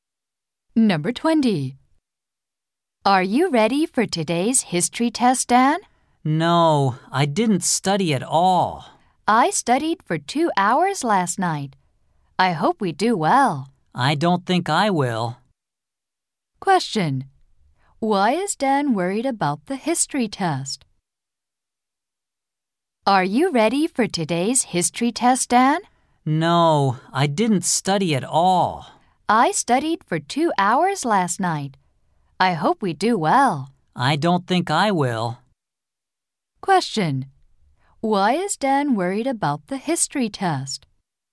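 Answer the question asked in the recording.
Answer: He didn't study at all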